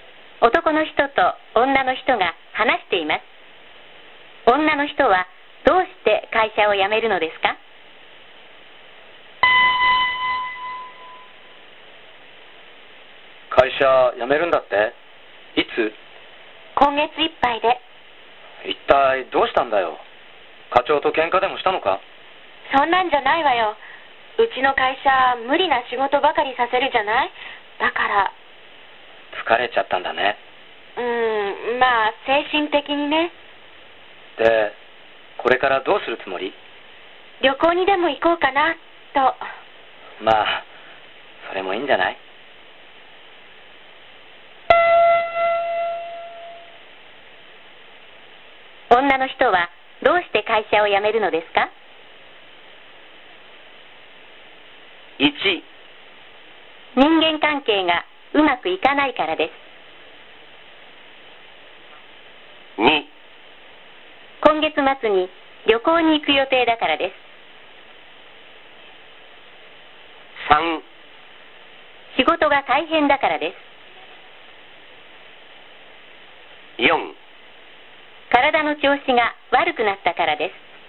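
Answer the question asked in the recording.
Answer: 3: 仕事が大変だからです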